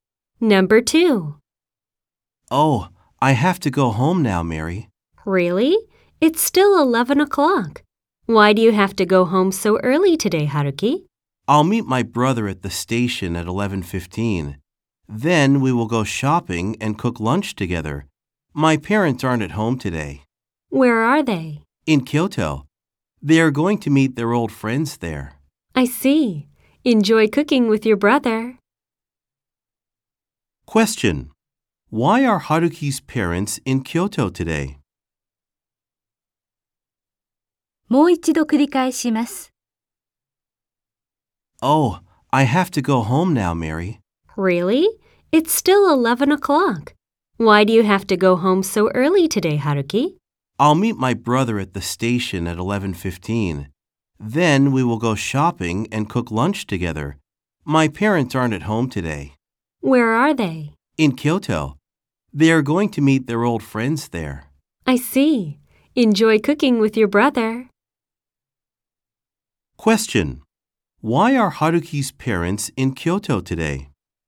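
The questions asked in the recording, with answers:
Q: Why are Haruki's parents in Kyoto today?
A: To meet their old friends there.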